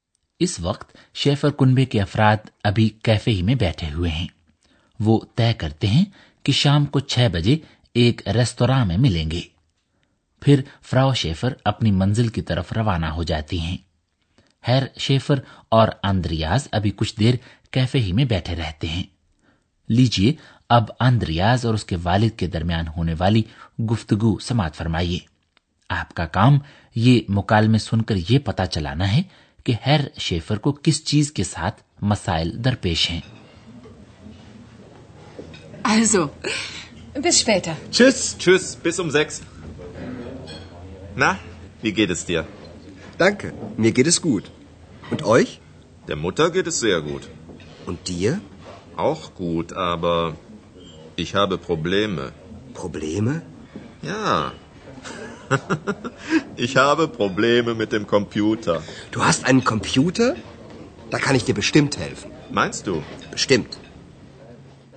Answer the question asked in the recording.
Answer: ہیر Schaefer کو اپنے computer کے ساتھ مسائل کا سامنا ہے